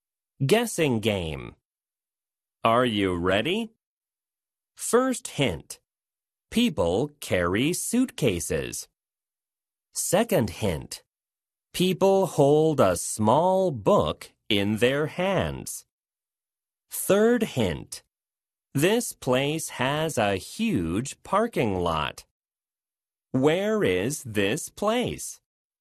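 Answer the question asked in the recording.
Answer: An airport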